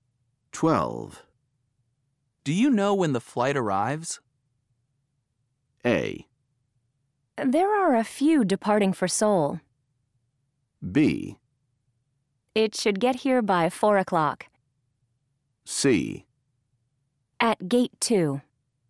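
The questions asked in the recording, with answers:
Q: Do you know when the flight arrives?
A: B: It should get here by 4 o'clock.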